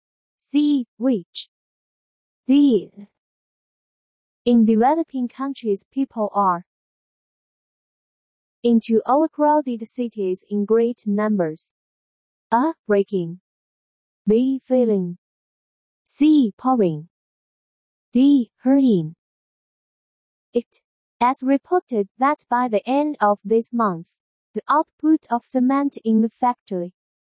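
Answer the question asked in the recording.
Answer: C: Pouring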